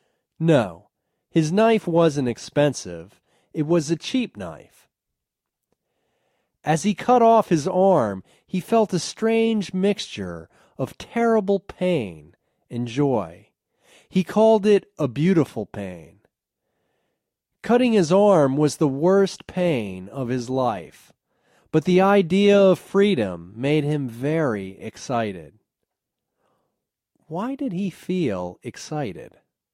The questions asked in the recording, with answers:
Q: Why did he feel excited?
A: He felt excited because he was almost free.